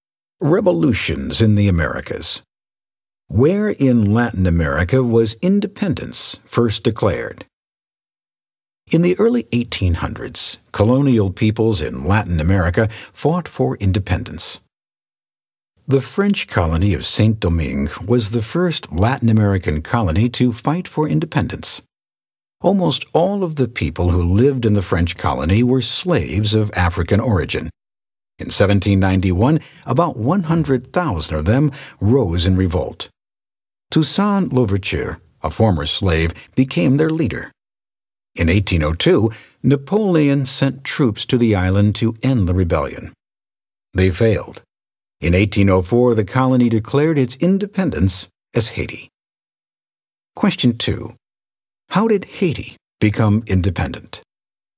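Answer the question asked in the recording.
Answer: Slaves revolted in 1791, led by Toussaint Louverture, defeated Napoleon's troops, and declared independence in 1804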